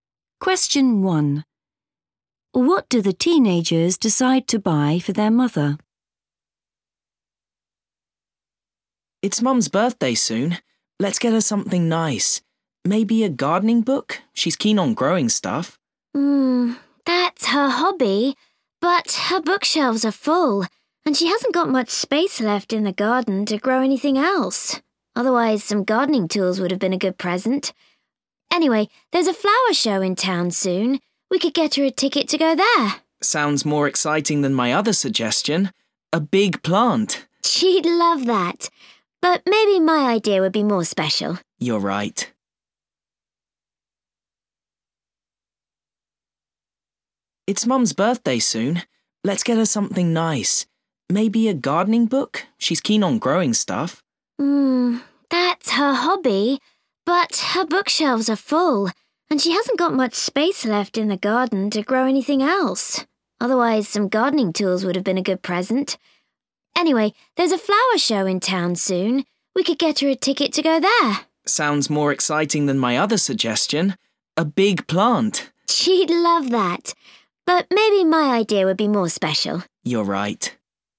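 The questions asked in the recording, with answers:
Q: What do the teenagers decide to buy for their mother?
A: a ticket to the flower show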